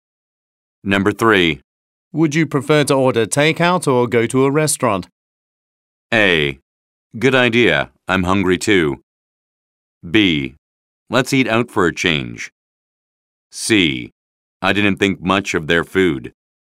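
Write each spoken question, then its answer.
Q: Would you prefer to order takeout or go to a restaurant?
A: B: Let's eat out for a change.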